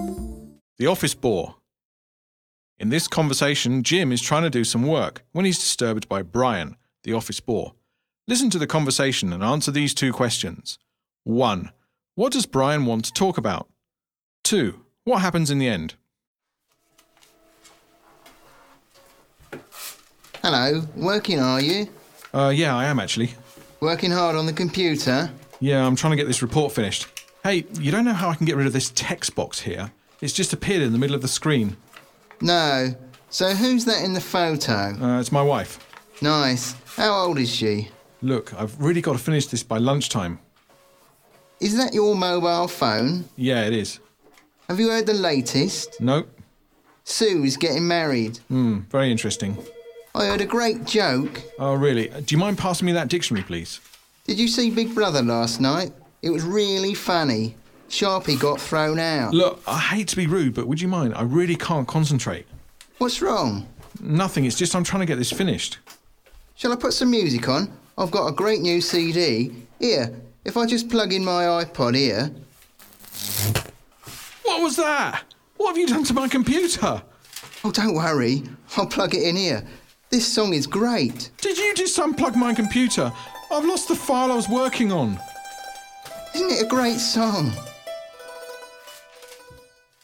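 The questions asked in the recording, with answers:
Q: What does Brian want to talk about?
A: Lots of trivial things: Jim's wife's photo, his mobile, office gossip (Sue's getting married), a joke, Big Brother, and music

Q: What happens in the end?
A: Brian unplugs Jim's computer to plug in his iPod, and Jim loses the file he was working on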